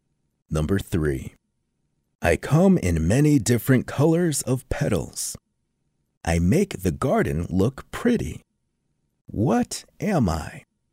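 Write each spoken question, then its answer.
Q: What am I?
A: a flower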